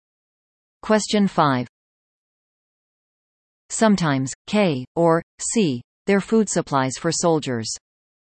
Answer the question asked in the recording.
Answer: The answer? Rations.